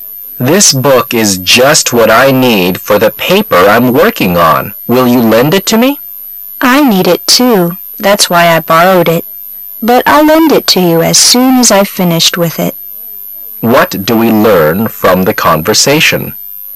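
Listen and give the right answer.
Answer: The book is being used by the other speaker, who will lend it after finishing

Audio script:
[解析] M: This book is just what I need for the paper I'm working on. Will you lend it to me? W: I need it too. That's why I borrowed it. But I'll lend it to you as soon as I've finished with it. Q: What do we learn from the conversation?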